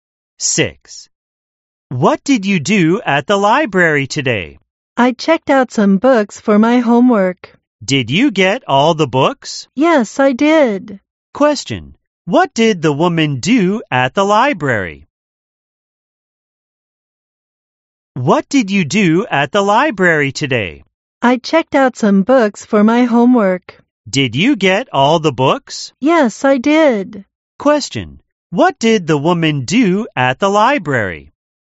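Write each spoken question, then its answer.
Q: What did the woman do at the library?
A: She checked out books for her homework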